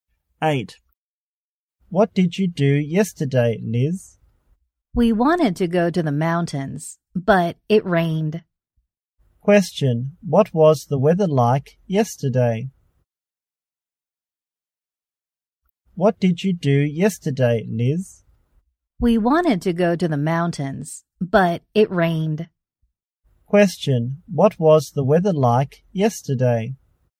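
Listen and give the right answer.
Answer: It was rainy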